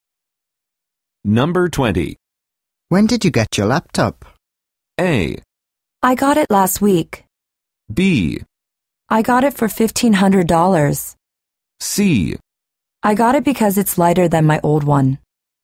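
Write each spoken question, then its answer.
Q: When did you get your laptop?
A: A: I got it last week.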